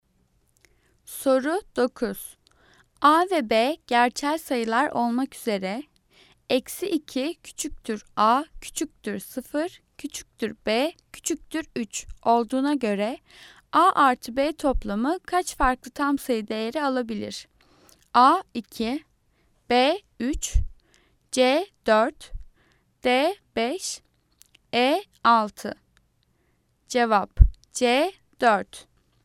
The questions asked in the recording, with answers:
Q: A ve B gerçel sayılar olmak üzere eksi 2 küçüktür A, küçüktür 0, küçüktür B, küçüktür 3 olduğuna göre A artı B toplamı kaç farklı tam sayı değeri alabilir?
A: Cevap C 4.